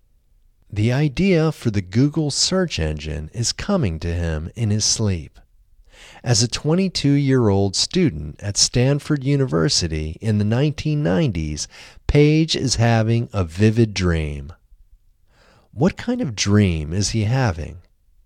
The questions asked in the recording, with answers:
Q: What kind of dream is he having?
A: He is having a vivid dream.